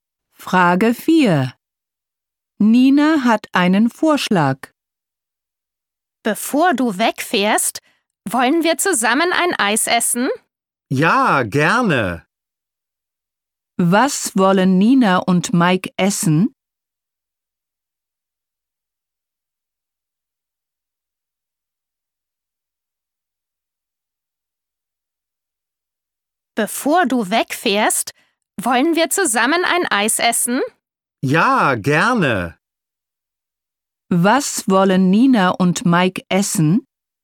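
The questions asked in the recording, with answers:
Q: Was wollen Nina und Mike essen?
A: Ein Eis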